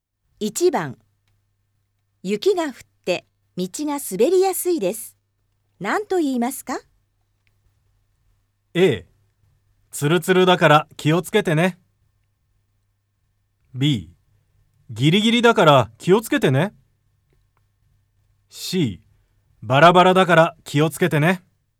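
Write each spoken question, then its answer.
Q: 雪が降って道が滑りやすいです。何と言いますか?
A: A: ツルツルだから気をつけてね。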